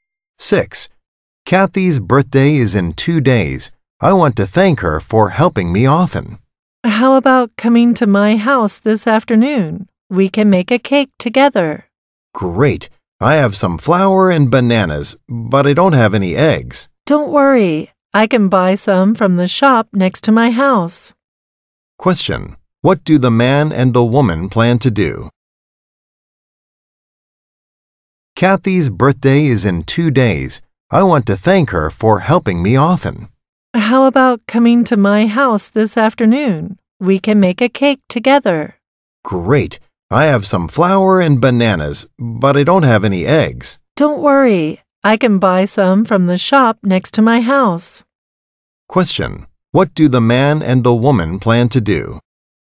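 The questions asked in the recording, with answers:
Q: What do the man and the woman plan to do?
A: Make a cake together for Kathy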